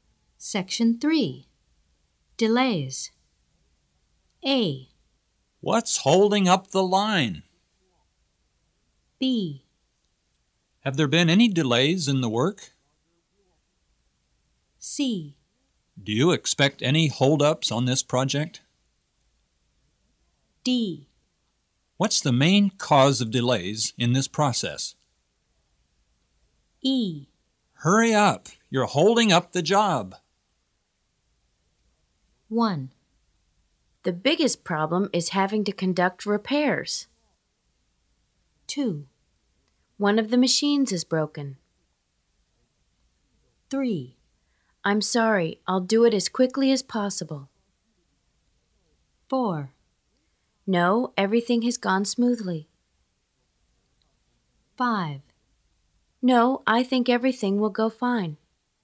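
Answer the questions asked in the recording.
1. D: What's the main cause of delays in this process?
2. A: What's holding up the line?
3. E: Hurry up! You're holding up the job!
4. B: Have there been any delays in the work?
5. C: Do you expect any holdups on this project?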